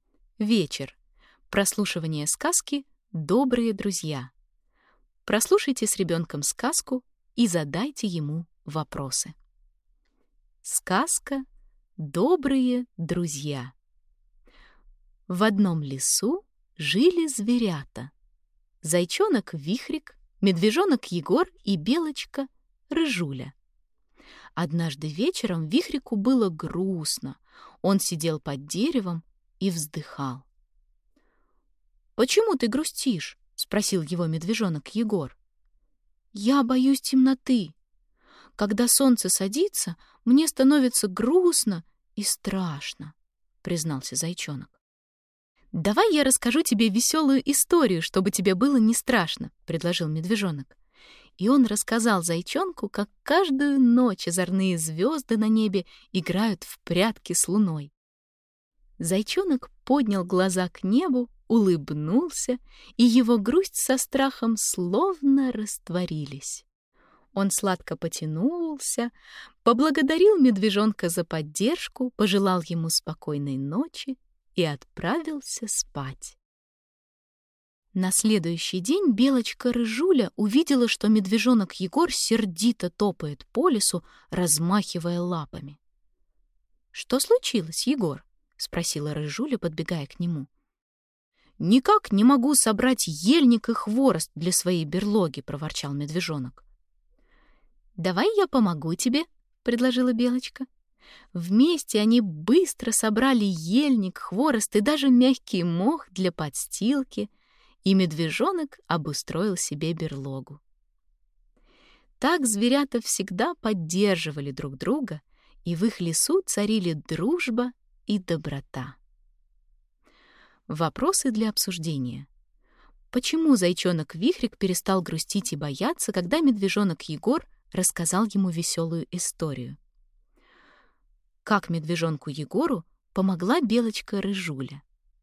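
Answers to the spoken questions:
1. Егор рассказал ему весёлую историю о том, как звёзды играют в прятки с луной, и Вихрик улыбнулся: грусть и страх прошли
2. Она помогла ему собрать ельник, хворост и мох для берлоги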